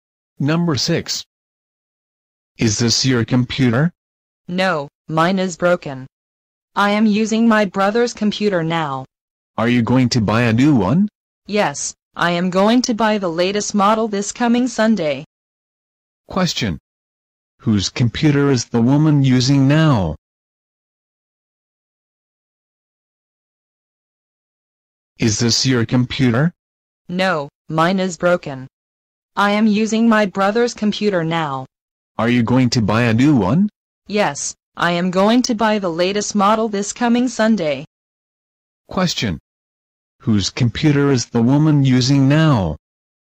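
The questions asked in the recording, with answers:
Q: Whose computer is the woman using now?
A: Her brother's computer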